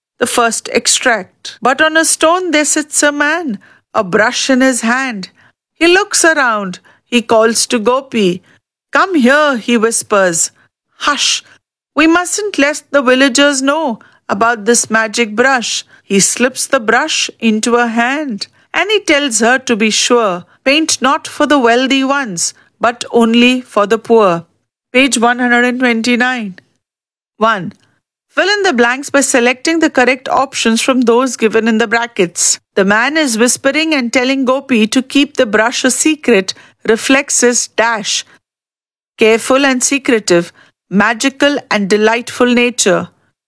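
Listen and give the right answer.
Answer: careful and secretive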